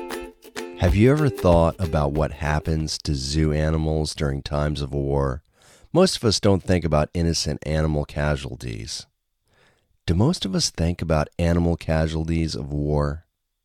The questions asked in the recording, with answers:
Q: Do most of us think about animal casualties of war?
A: No, most of us don't think of animal casualties of war.